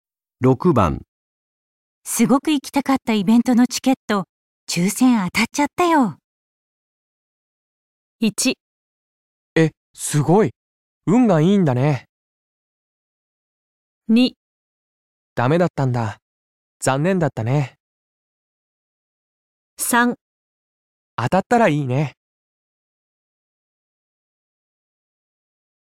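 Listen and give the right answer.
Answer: えっ!すごい、運がいいんだね!

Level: N2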